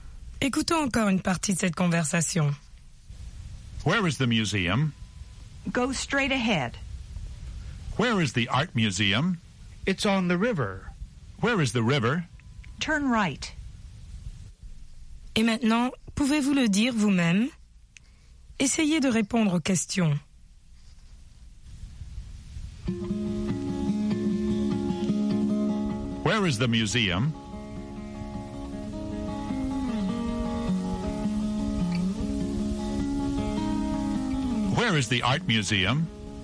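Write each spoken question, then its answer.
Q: Where is the museum?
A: Go straight ahead.

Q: Where is the art museum?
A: It's on the river.

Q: Where is the river?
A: Turn right.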